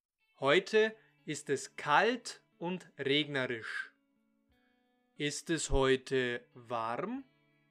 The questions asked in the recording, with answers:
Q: Ist es heute warm?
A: Nein, es ist heute nicht warm.